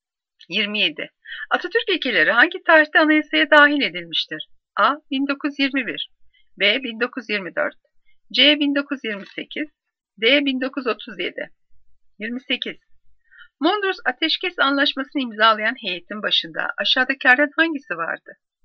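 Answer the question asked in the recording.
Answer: D: 1937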